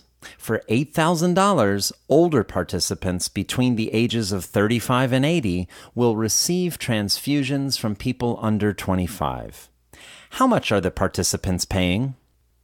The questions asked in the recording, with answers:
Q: How much are the participants paying?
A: Participants are paying $8,000.